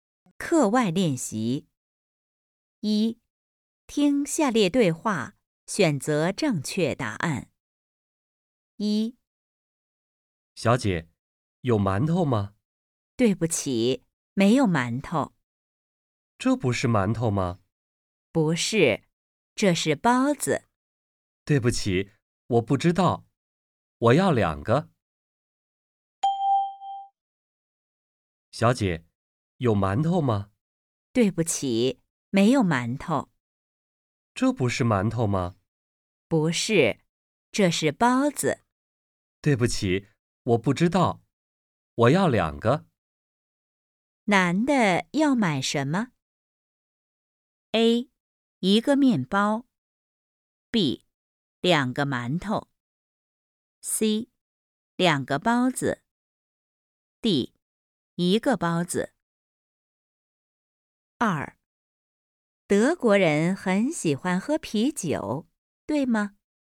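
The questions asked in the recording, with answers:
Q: 男的要买什么?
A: C: 两个包子。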